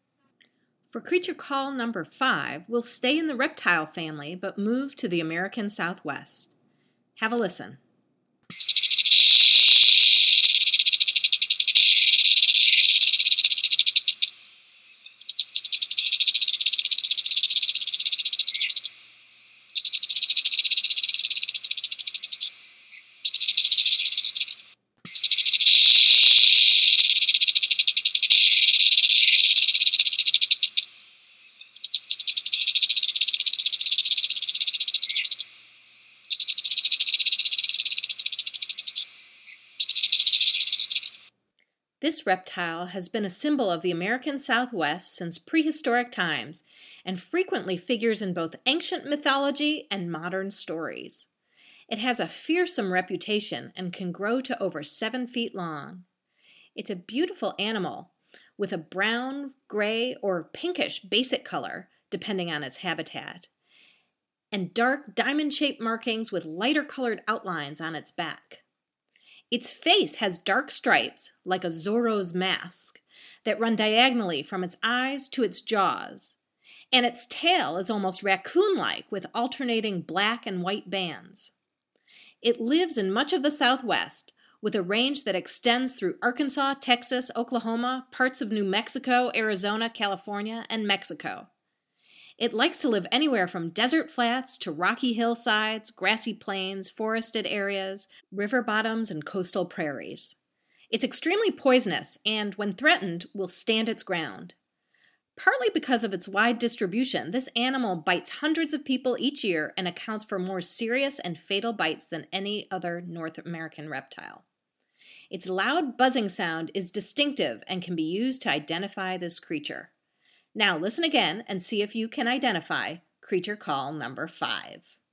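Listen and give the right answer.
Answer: western diamondback rattlesnake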